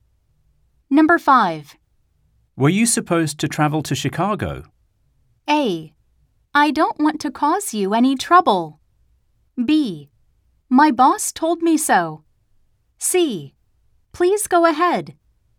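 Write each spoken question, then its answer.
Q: Were you supposed to travel to Chicago?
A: B: My boss told me so.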